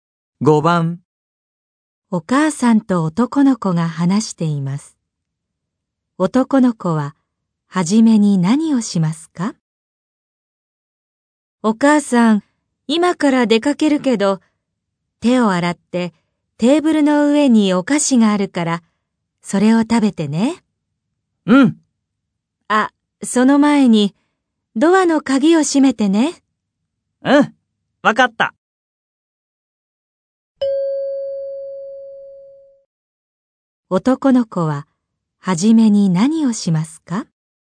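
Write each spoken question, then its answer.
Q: 男の子は初めに何をしますか?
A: ドアの鍵を閉める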